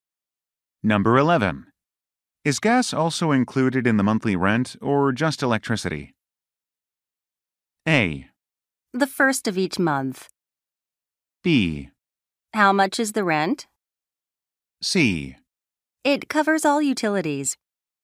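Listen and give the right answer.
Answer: C: It covers all utilities.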